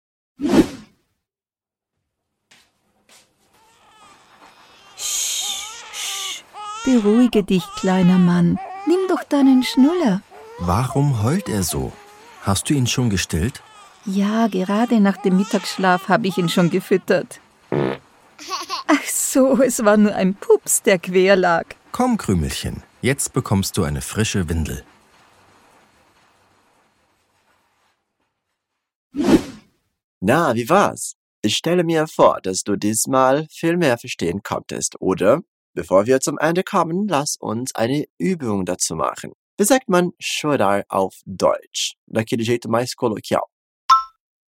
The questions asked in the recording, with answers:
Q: Wie sagt man chorar auf Deutsch?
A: Heulen. Heulen.